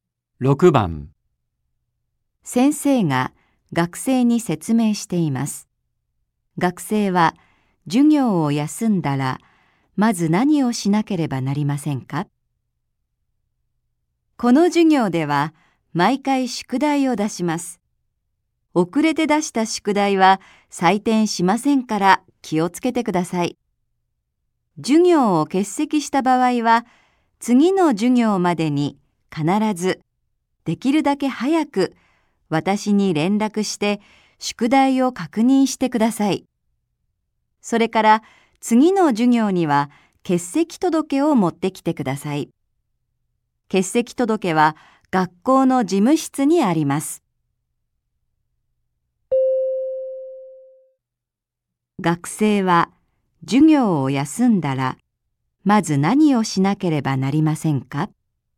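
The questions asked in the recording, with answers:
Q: 学生は授業を休んだらまず何をしなければなりませんか?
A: できるだけ早く先生に連絡して宿題を確認する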